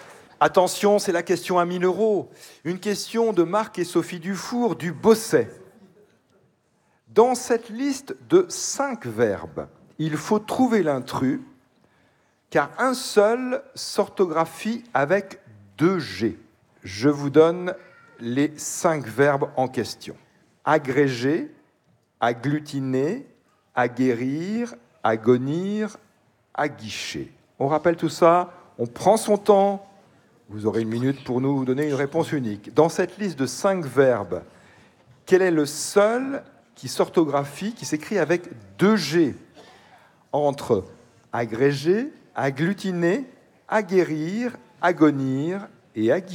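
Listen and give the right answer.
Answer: agglutiner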